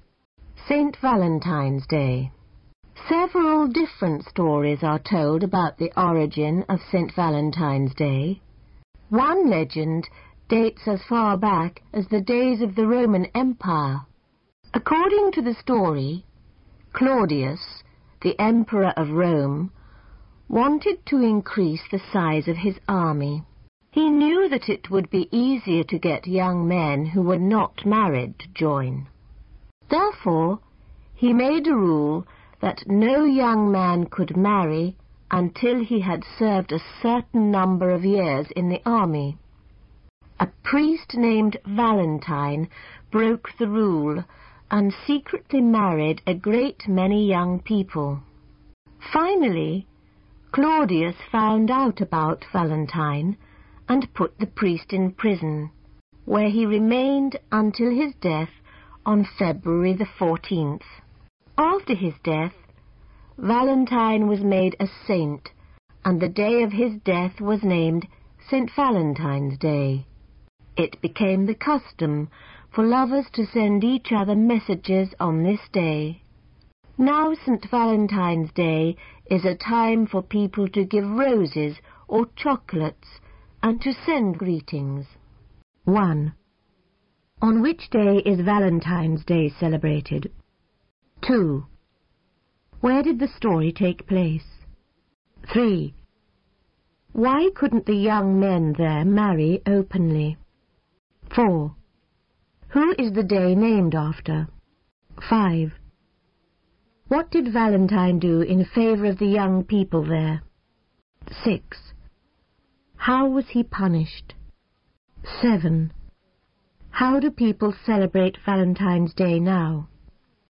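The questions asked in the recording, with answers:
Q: On which day is Valentine's Day celebrated?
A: February 14th

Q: Where did the story take place?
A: In Rome (the Roman Empire)

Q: Why couldn't the young men there marry openly?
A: The emperor ruled they must serve in the army first

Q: Who is the day named after?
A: A priest named Valentine

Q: What did Valentine do in favor of the young people there?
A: He secretly married them

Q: How was he punished?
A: He was put in prison until his death

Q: How do people celebrate Valentine's Day now?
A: By giving roses or chocolates and sending greetings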